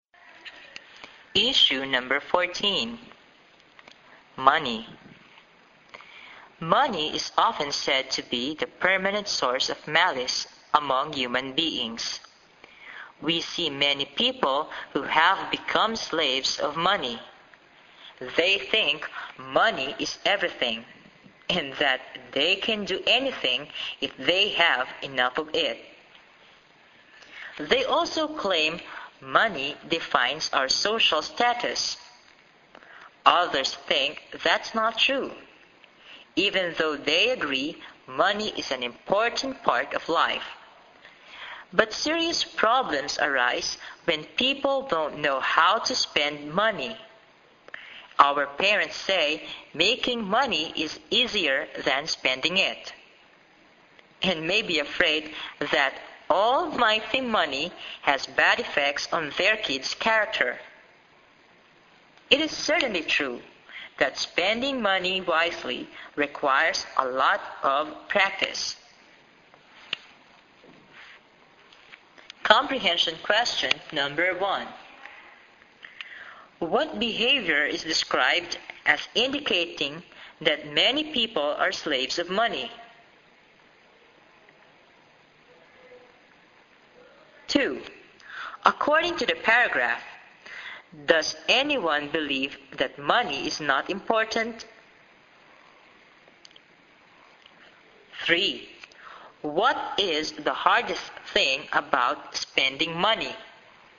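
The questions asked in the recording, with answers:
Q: What behavior is described as indicating that many people are slaves of money?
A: They think money is everything and that they can do anything if they have enough of it.

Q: According to the paragraph, does anyone believe that money is not important?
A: No; even those who disagree agree money is an important part of life.

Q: What is the hardest thing about spending money?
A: Spending it wisely requires a lot of practice.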